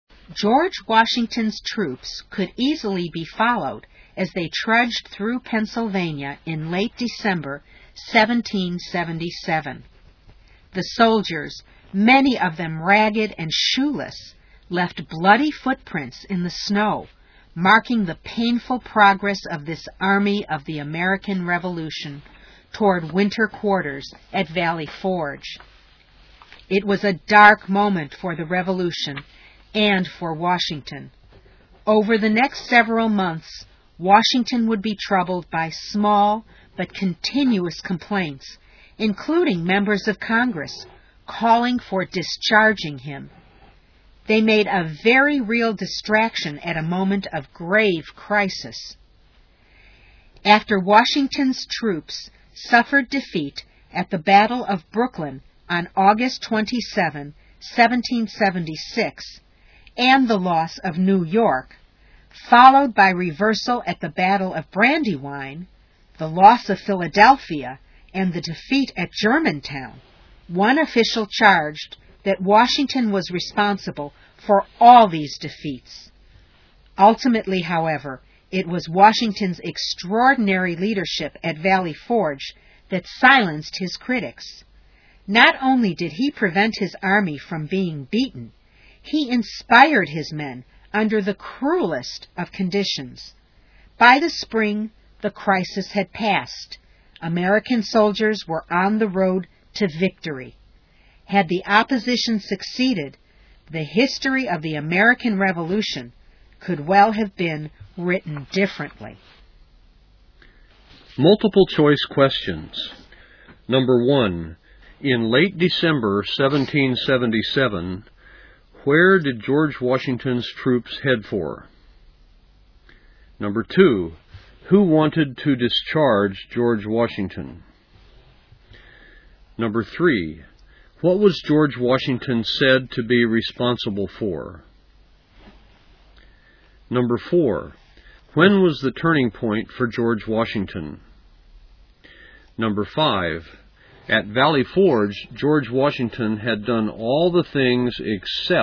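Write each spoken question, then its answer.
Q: in late December 1777, where did George Washington's troops head for?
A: Valley Forge (winter quarters)

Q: who wanted to discharge George Washington?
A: Members of Congress

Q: what was George Washington said to be responsible for?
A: The army's defeats (Brooklyn, Brandywine, Germantown)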